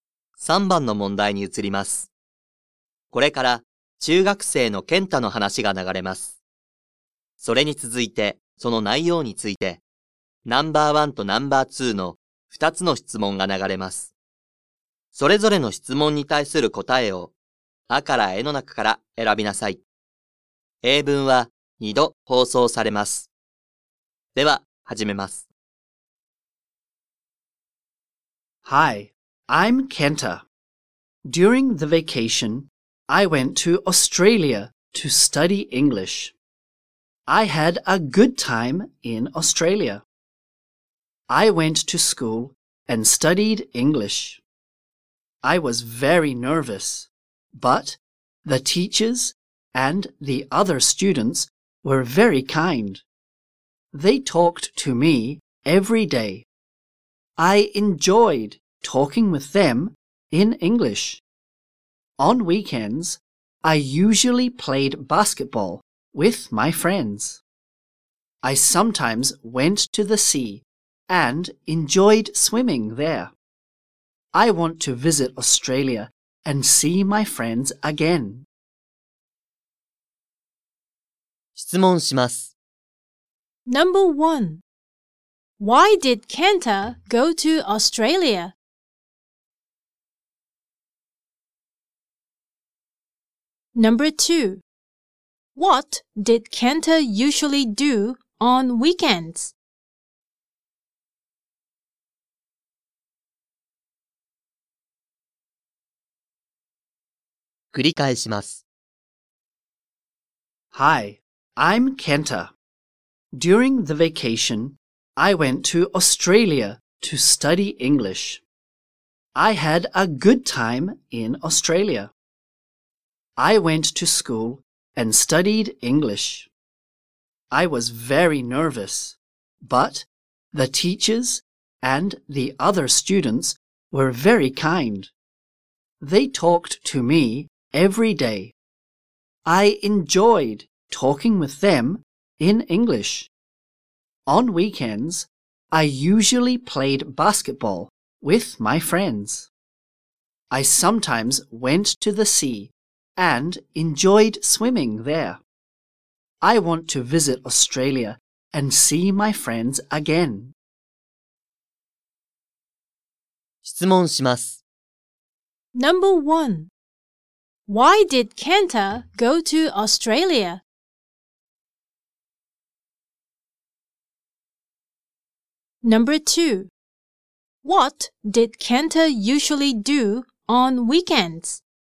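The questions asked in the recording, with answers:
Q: Why did Kenta go to Australia?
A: To study English.

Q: What did Kenta usually do on weekends?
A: He played basketball with his friends.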